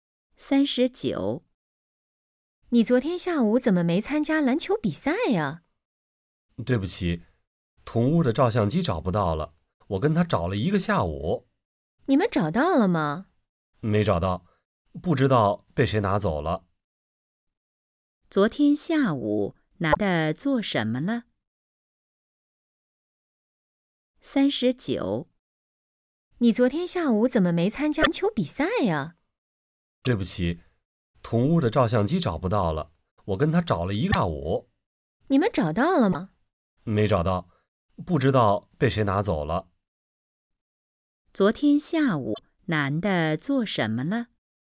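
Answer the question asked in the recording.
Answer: 帮同屋找照相机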